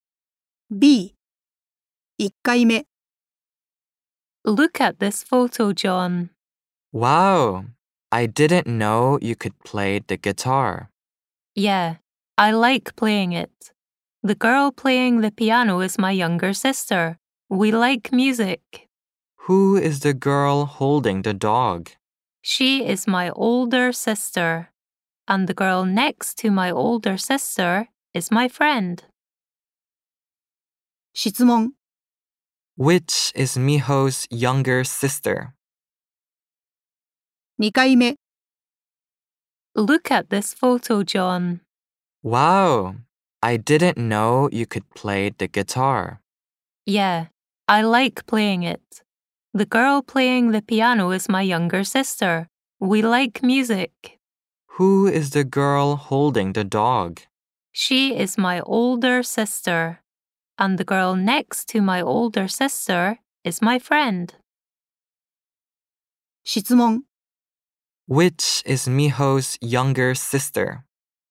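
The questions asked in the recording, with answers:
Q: Which is Miho's younger sister?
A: The girl playing the piano.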